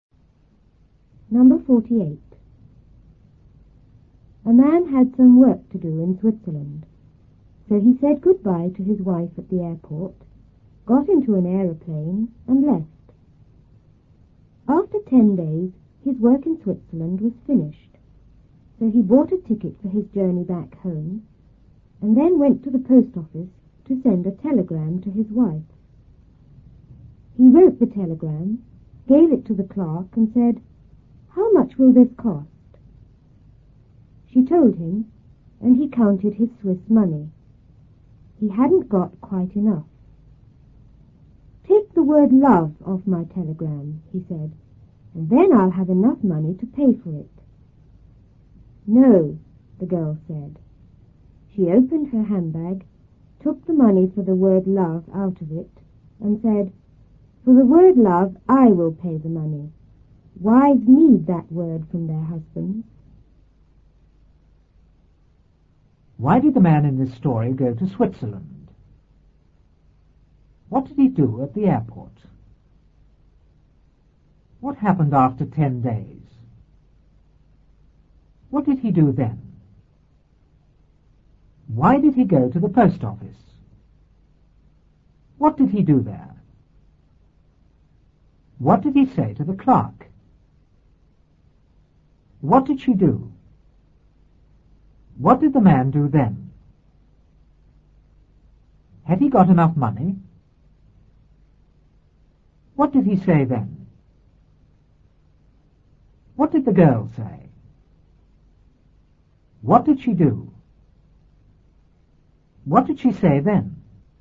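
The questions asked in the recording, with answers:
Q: Why did the man in this story go to Switzerland?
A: He had some work to do there.

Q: What did he do at the airport?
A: He said goodbye to his wife and got into an aeroplane.

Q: What happened after 10 days?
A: His work in Switzerland was finished.

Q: What did he do then?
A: He bought a ticket home and went to the post office.

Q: Why did he go to the post office?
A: To send a telegram to his wife.

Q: What did he do there?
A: He wrote the telegram and gave it to the clerk.

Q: What did he say to the clerk?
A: "How much will this cost?"

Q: What did she do?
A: She told him the price.

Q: What did the man do then?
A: He counted his Swiss money.

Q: Had he got enough money?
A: No, not quite enough.

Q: What did he say then?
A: "Take the word love off my telegram, and then I'll have enough money."

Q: What did the girl say?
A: "No."

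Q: What did she do?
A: She took the money for the word love out of her handbag.

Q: What did she say then?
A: "For the word love, I will pay the money. Wives need that word from their husbands."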